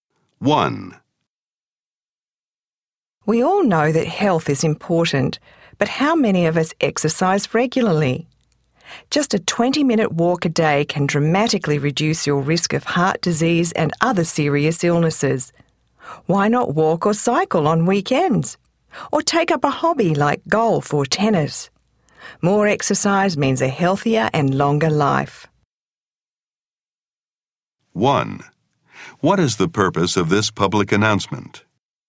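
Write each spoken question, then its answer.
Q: What is the purpose of this public announcement?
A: To encourage people to exercise regularly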